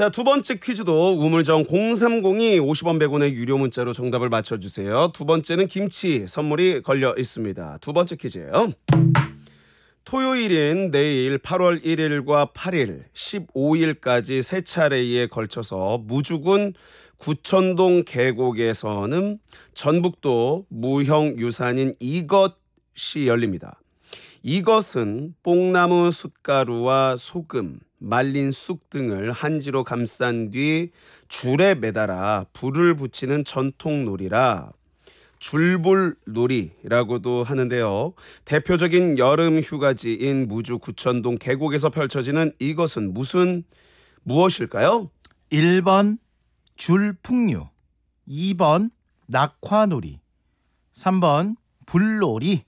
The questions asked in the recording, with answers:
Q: 대표적인 여름 휴가지인 무주 구천동 계곡에서 펼쳐지는 이것은 무슨 무엇일까요?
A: 2번 낙화놀이가 정답이 되겠습니다.